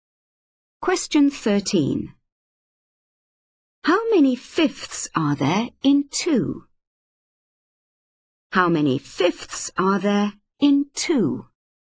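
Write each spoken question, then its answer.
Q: How many fifths are there in 2?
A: 10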